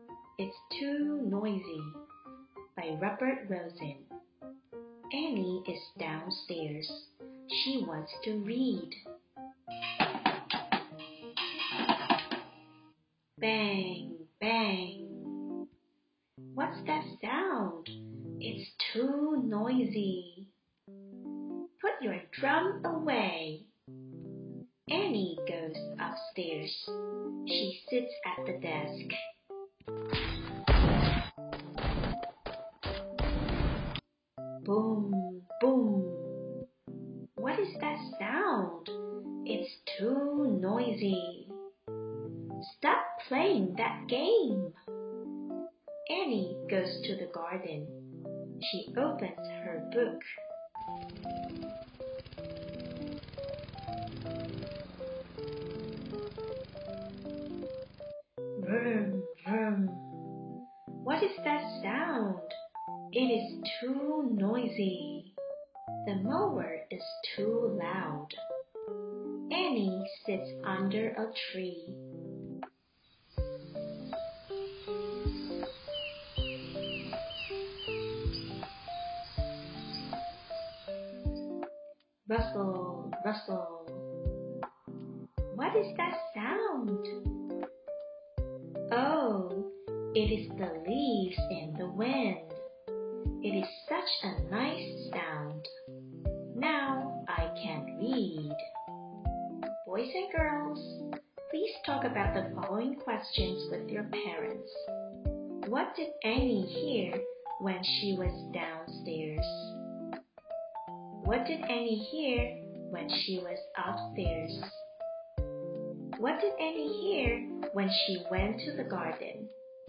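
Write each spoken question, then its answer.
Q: What did Annie hear when she was downstairs?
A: A drum (bang, bang)

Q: What did Annie hear when she was upstairs?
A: A game (boom, boom)

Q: What did Annie hear when she went to the garden?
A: The loud mower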